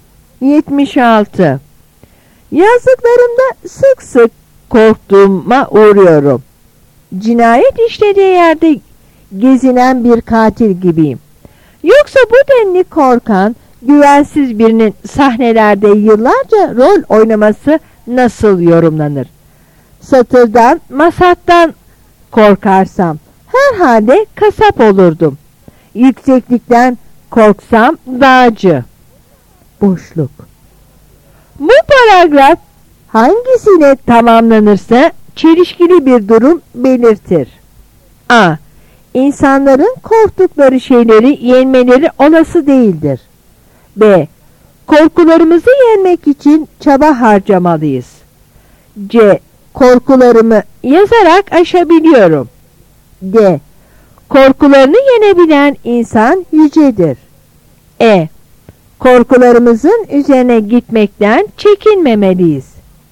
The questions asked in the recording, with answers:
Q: Bu paragraf hangisiyle tamamlanırsa çelişkili bir durum belirtir.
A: Yanıt A.